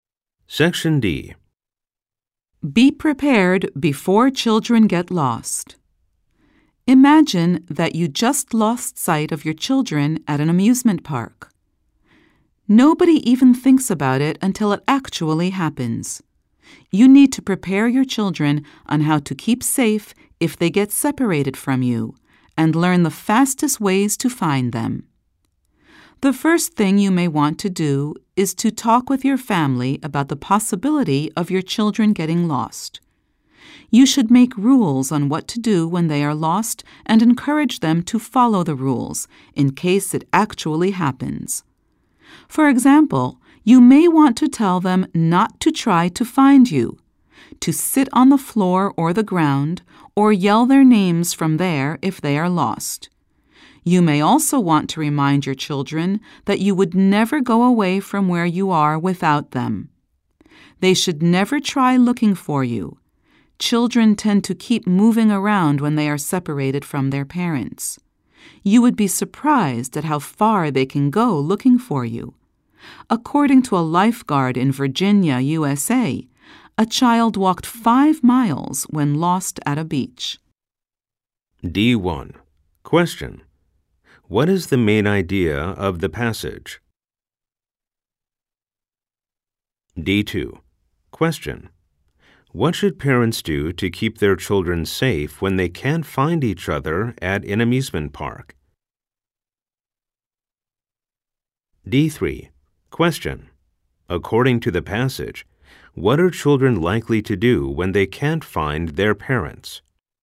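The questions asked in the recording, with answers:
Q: What is the main idea of the passage?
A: Parents should prepare their children before they get lost

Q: What should parents do to keep their children safe when they can't find each other at an amusement park?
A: Make rules about what to do when lost and encourage children to follow them

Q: According to the passage, what are children likely to do when they can't find their parents?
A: Keep moving around looking for their parents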